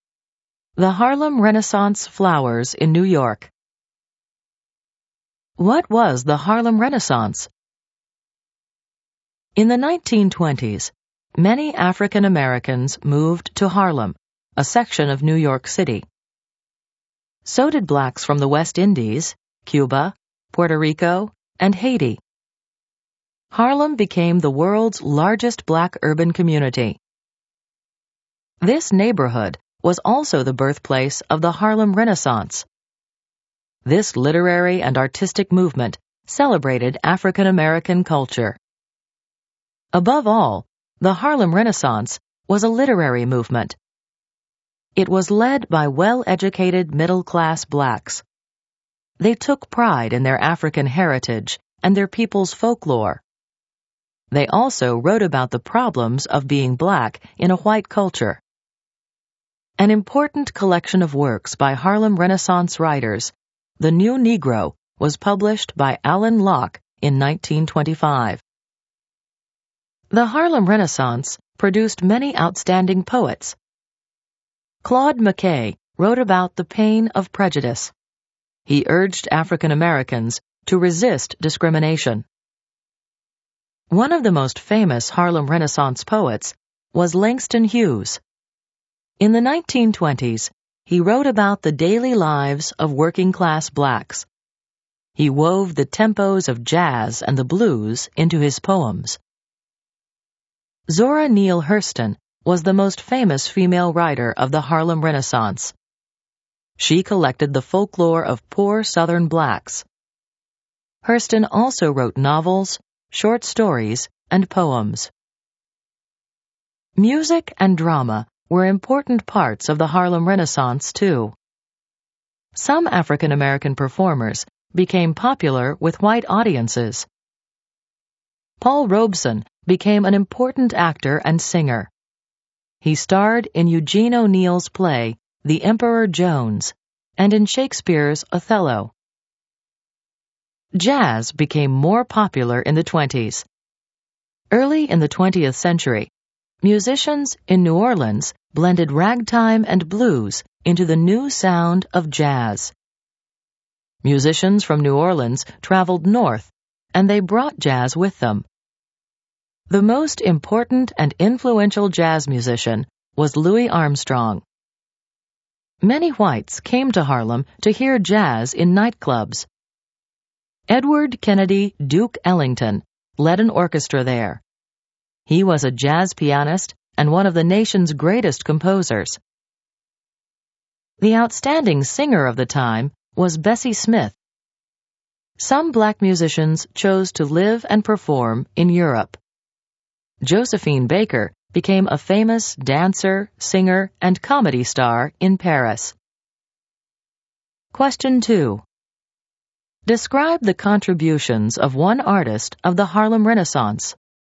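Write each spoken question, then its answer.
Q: Describe the contributions of one artist of the Harlem Renaissance.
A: E.g., Langston Hughes wrote poems about the daily lives of working-class blacks, using jazz and blues rhythms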